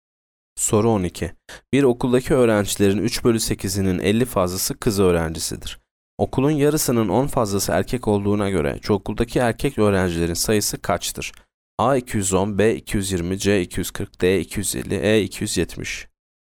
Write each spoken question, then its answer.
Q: Okulun yarısının 10 fazlası erkek olduğuna göre çoğunluktaki erkek öğrencilerin sayısı kaçtır?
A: Yanıt D 250.